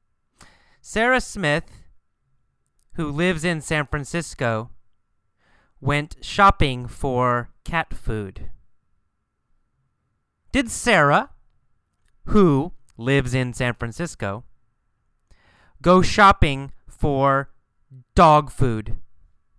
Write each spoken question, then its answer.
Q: Did Sara, who lives in San Francisco, go shopping for dog food?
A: No. No. Sara, who lives in San Francisco, didn't go shopping for dog food.